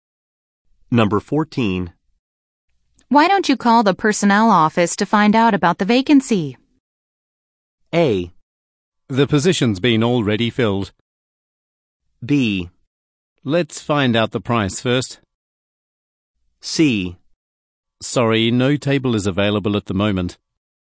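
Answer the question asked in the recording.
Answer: A: The position's been already filled.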